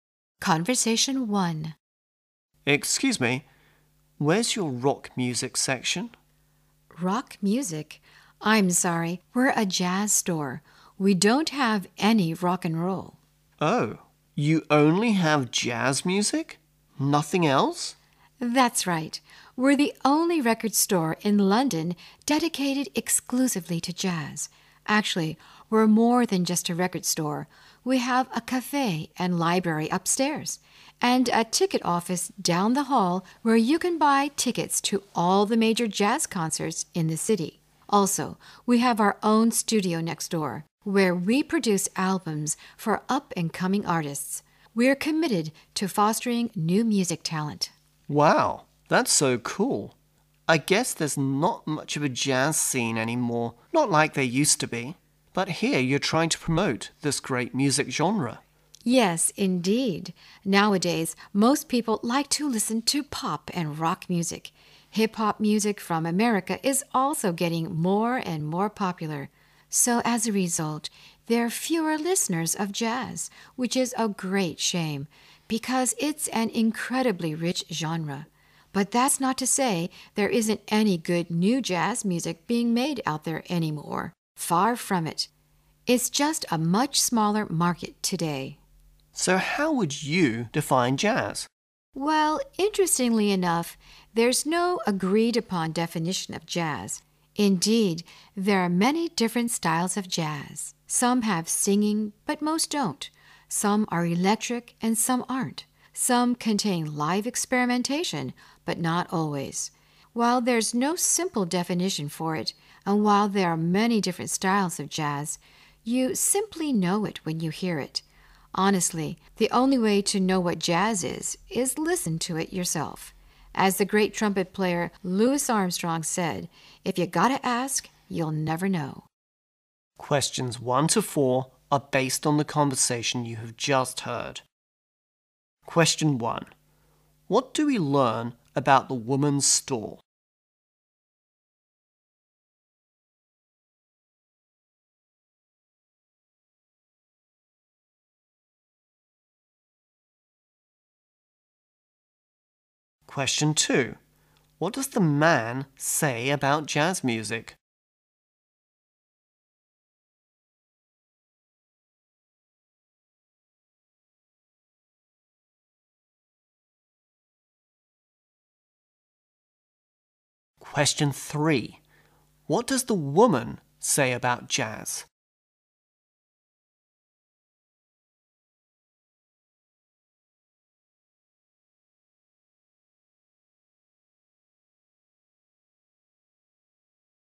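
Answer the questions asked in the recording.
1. It sells only jazz music and also has a cafe, library, ticket office and studio.
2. There isn't much of a jazz scene anymore.
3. There is no agreed-upon definition of it.
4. Listen to it yourself.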